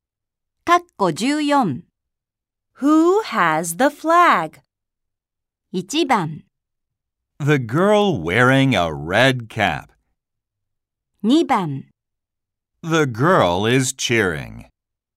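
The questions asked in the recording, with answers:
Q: Who has the flag?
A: 1: The girl wearing a red cap.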